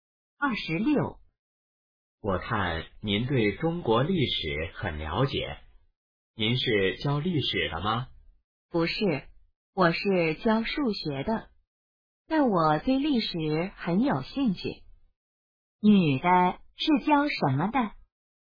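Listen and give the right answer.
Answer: 数学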